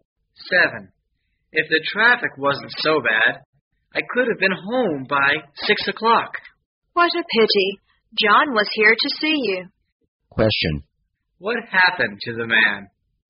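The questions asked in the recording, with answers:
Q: What happened to the man?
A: He got home late because of traffic and missed John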